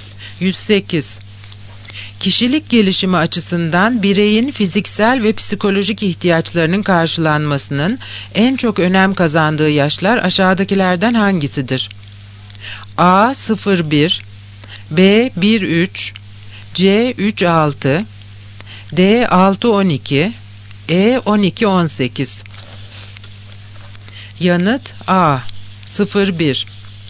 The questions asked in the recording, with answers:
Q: Kişilik gelişimi açısından bireyin fiziksel ve psikolojik ihtiyaçlarının karşılanmasının en çok önem kazandığı yaşlar aşağıdakilerden hangisidir?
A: Yanıt A. 0-1.